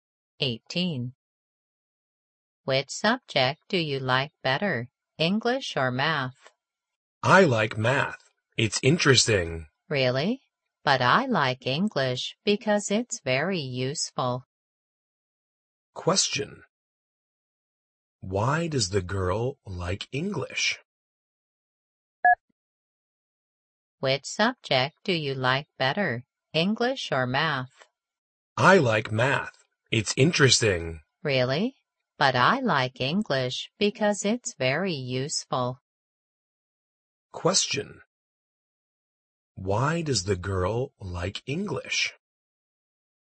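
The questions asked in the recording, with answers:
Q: Why does the girl like English?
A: Because it's very useful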